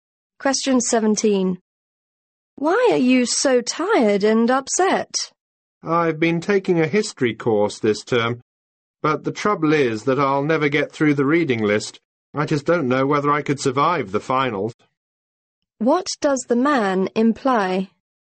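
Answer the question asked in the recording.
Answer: He is worried he can't finish the reading list or pass the finals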